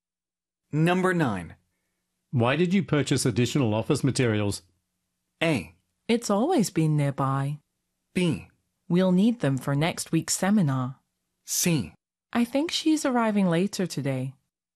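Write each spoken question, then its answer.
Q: Why did you purchase additional office materials?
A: B: We'll need them for next week's seminar.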